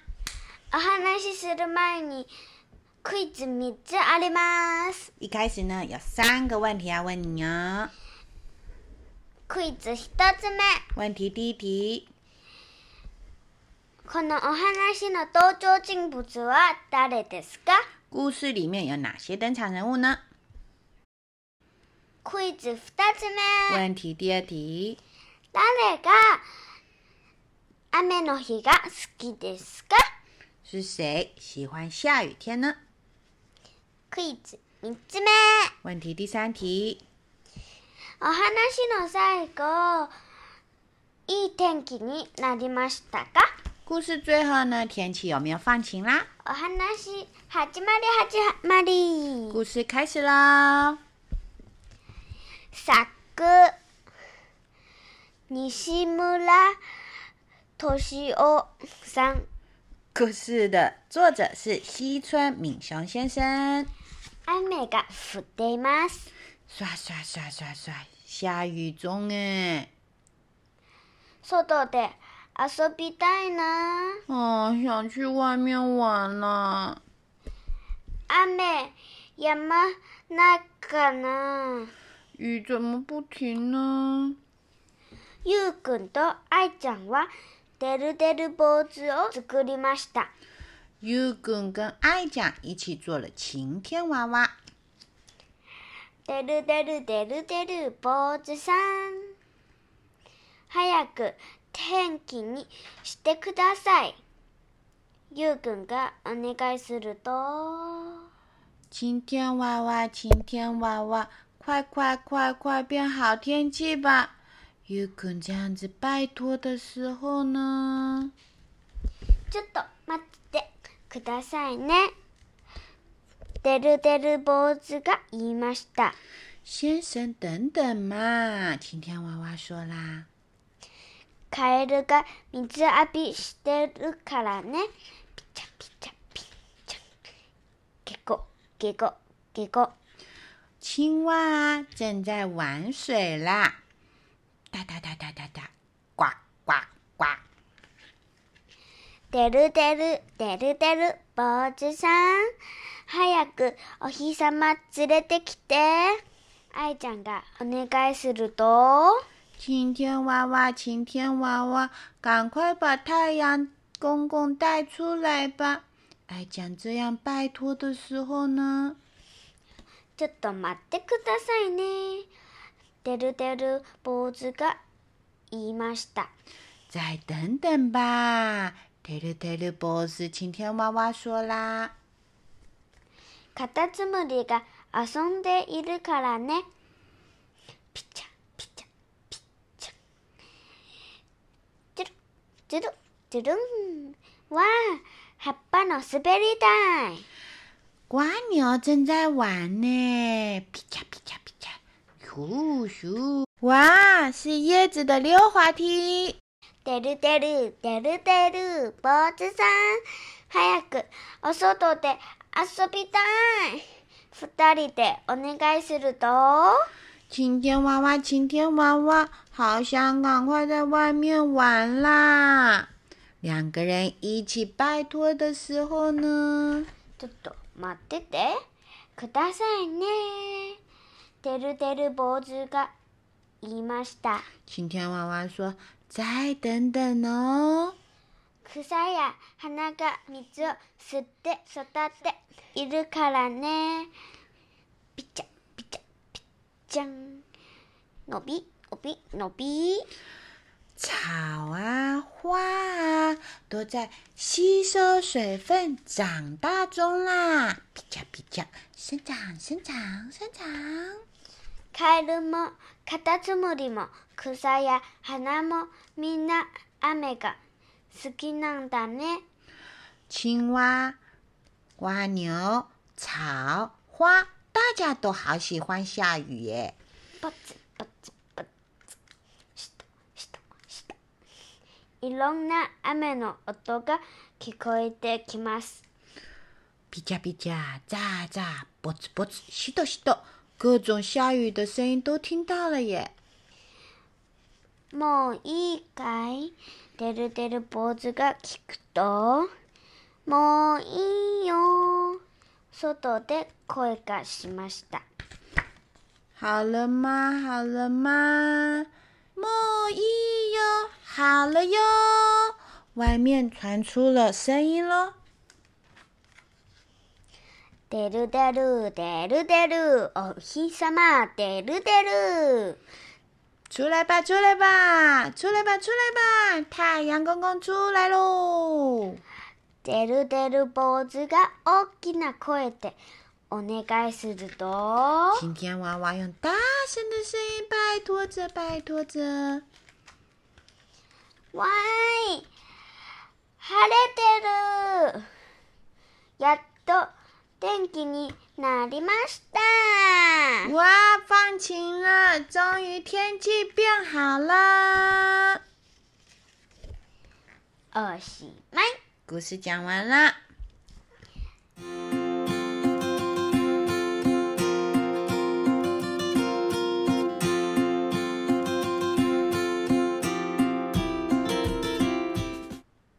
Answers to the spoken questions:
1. と、てるてる坊主さんと、
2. カエルとカタツムリと草花。
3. てるてる坊主さんが手伝ったおかげでいい天気になりました。